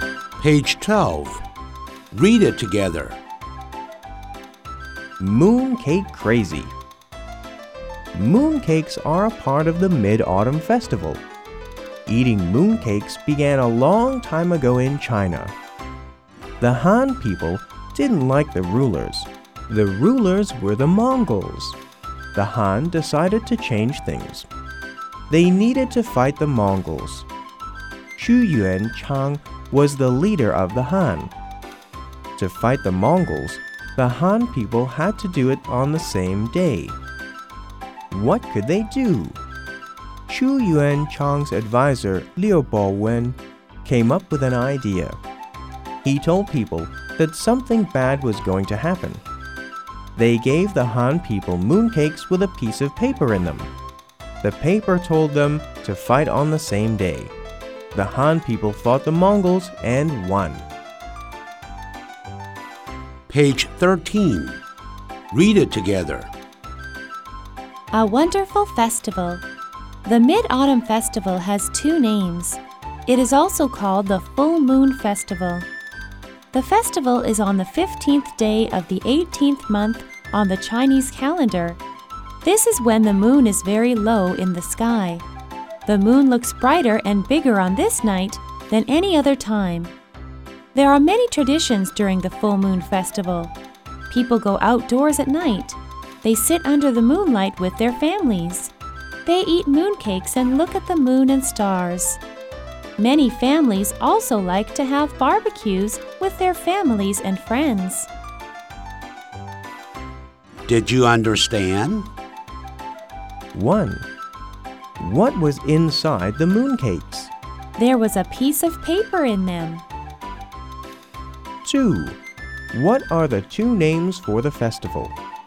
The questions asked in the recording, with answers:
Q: What are the two names for the festival?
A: The festival is named the Mid-Autumn Festival and the Full Moon Festival.